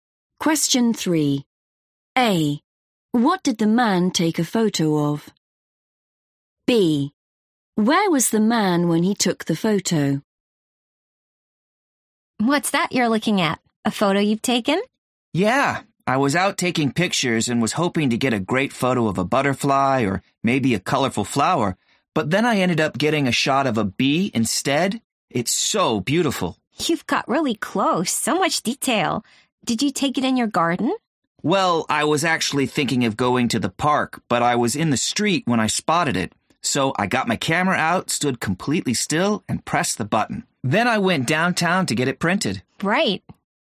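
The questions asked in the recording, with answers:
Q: What did the man take a photo of?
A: a bee

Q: Where was the man when he took the photo?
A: in the street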